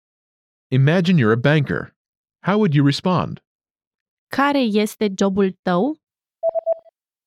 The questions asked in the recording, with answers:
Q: Care este jobul tău?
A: Eu sunt bancher.